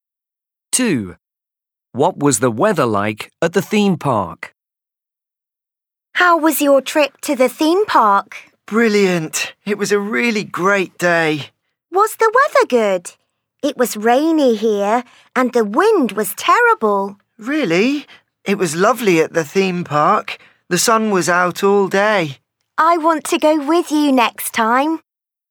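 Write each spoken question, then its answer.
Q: What was the weather like at the theme park?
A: Sunny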